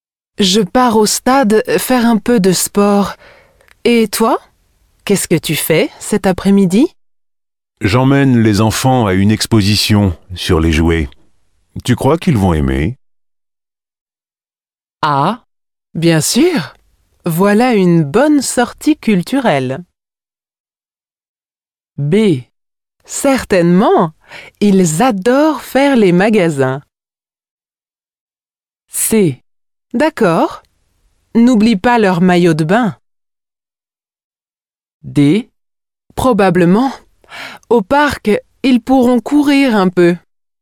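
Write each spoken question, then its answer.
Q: Tu crois qu'ils vont aimer?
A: A: Ah, bien sûr! Voilà une bonne sortie culturelle.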